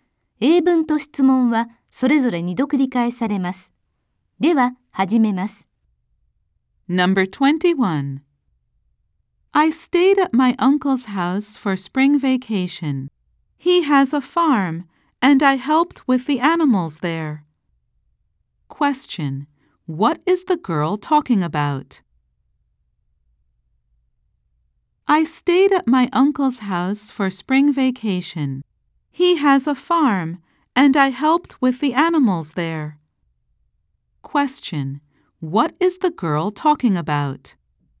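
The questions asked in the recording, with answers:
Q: What is the girl talking about?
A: Her spring vacation at her uncle's farm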